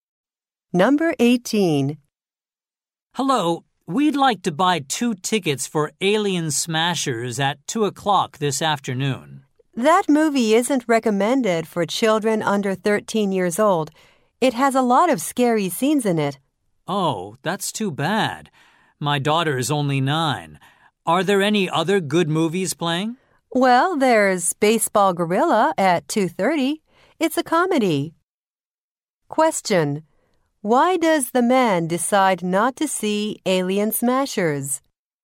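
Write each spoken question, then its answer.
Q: Why does the man decide not to see Alien Smashers?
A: It is not recommended for children under 13 and his daughter is 9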